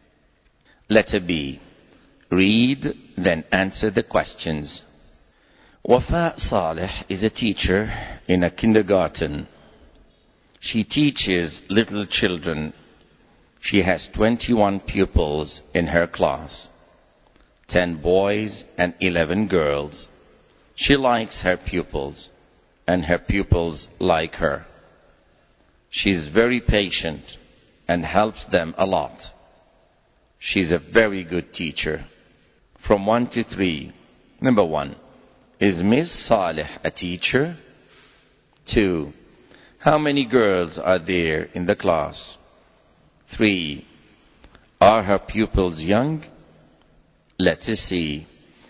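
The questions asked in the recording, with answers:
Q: Is Ms. Saleh a teacher?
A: Yes, she is.

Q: How many girls are there in the class?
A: 11

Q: Are her pupils young?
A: Yes, they are.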